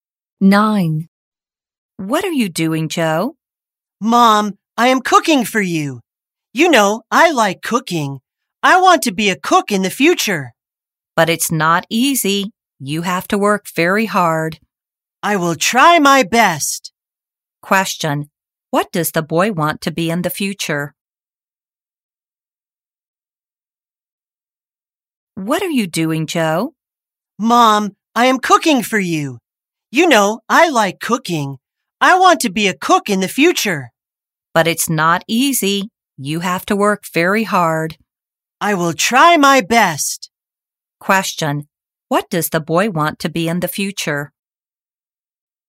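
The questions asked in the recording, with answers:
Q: Question. What does the boy want to be in the future?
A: A cook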